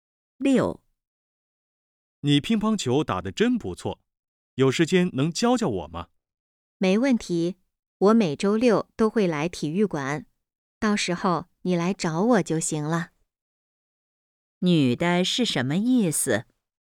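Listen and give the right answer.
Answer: 愿意教他打乒乓球,周六去体育馆找她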